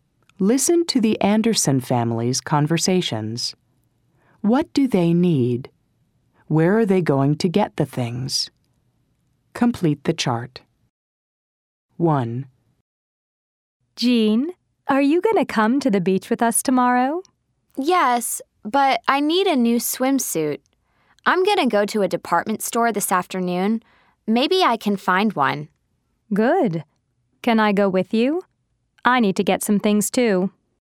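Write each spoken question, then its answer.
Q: What do they need?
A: A new swimsuit

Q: Where are they going to get the things?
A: At a department store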